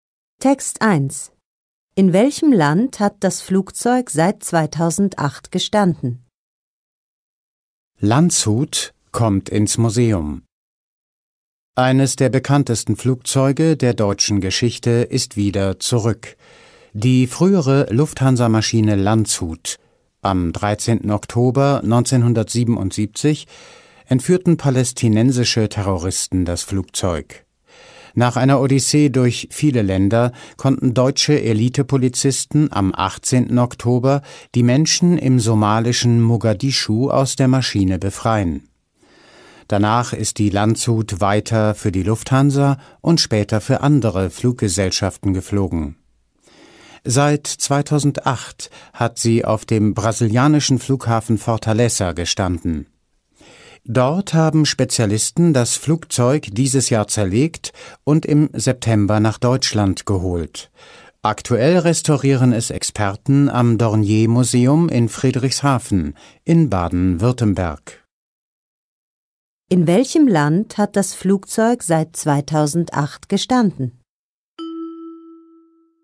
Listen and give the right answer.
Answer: In Brasilien.